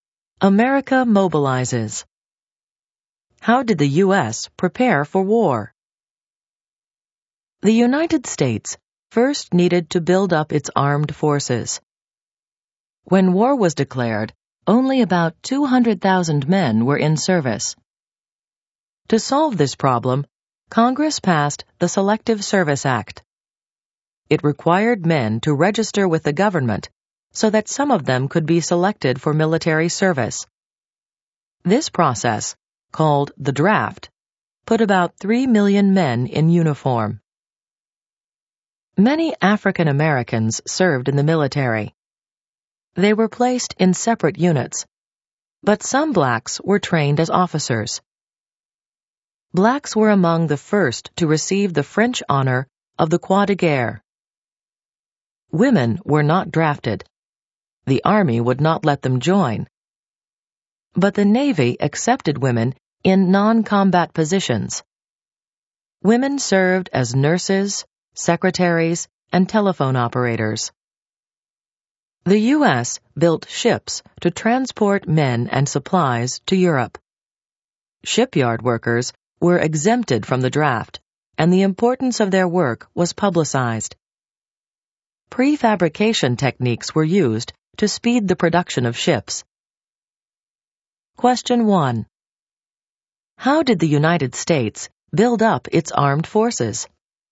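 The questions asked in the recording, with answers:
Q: How did the United States build up its armed forces?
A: Through the draft under the Selective Service Act, which put about 3 million men in uniform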